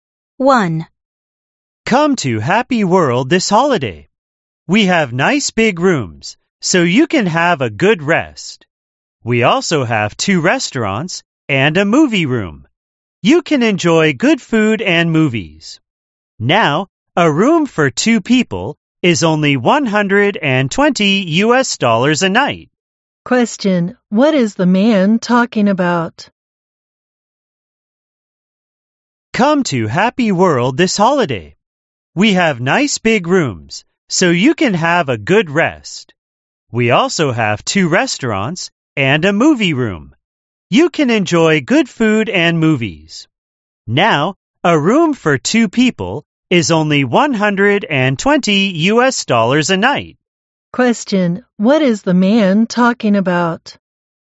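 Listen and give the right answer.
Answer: A hotel (Happy World) and its rooms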